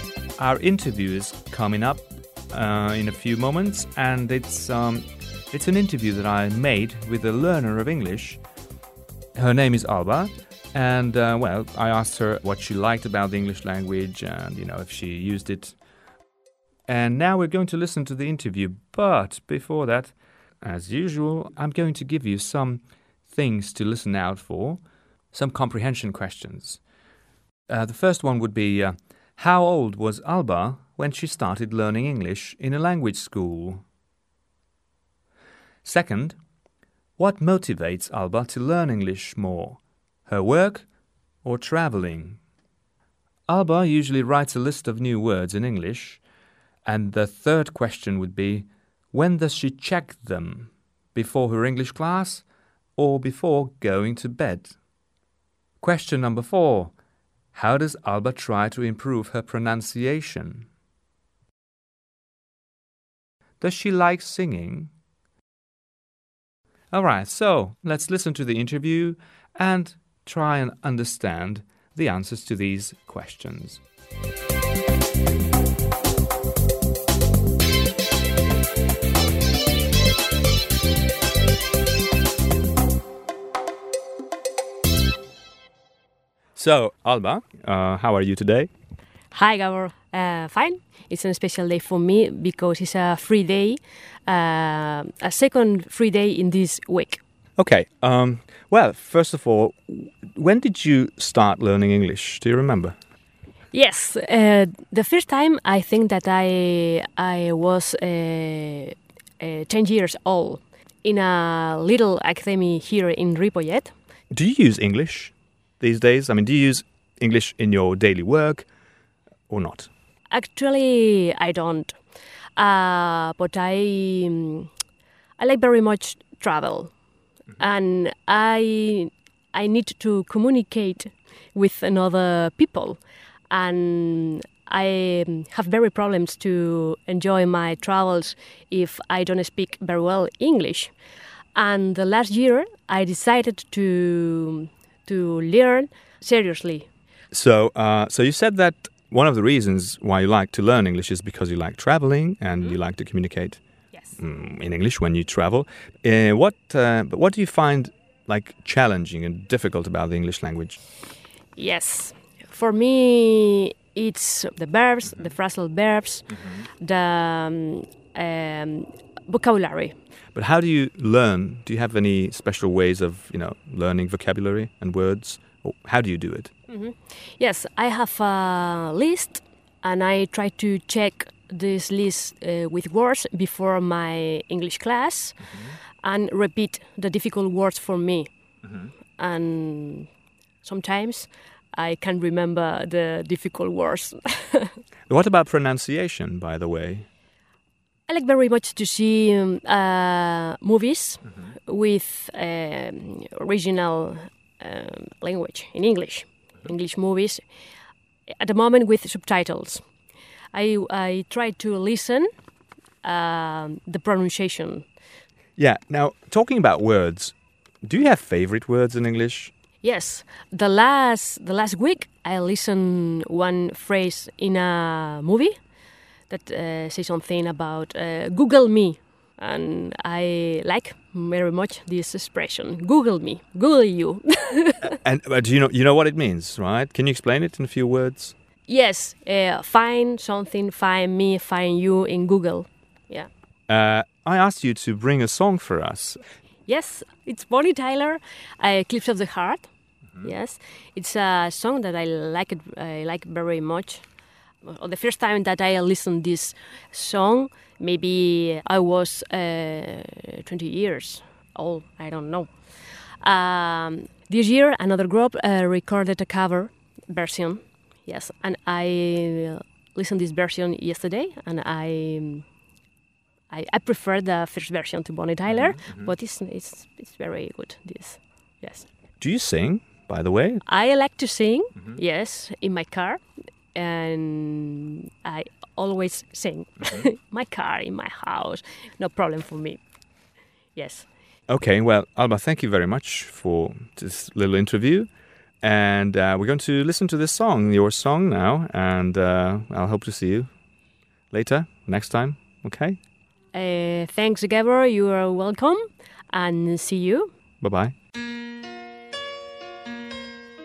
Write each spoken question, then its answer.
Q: how old was Alba when she started learning English in a language school?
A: Well, she was about 10 years old.

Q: what motivates Alba to learn English more, her work or traveling?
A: Well, she says that she doesn't really use English at work, and it's traveling that she thinks she needs English for.

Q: when does she check them?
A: Well, she does it before her English class.

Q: how does Alba try to improve her pronunciation?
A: She watches movies in original versions, that is, in English.

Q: Does she like singing?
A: Yeah, she says she does. She sings in her car, she sings at home.